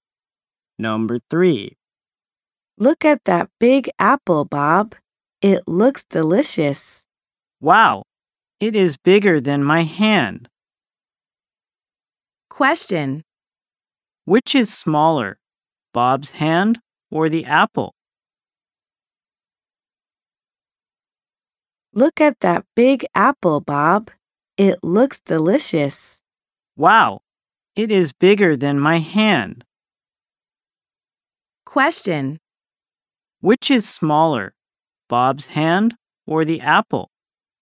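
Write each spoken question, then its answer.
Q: Which is smaller, Bob's hand or the apple?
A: Bob's hand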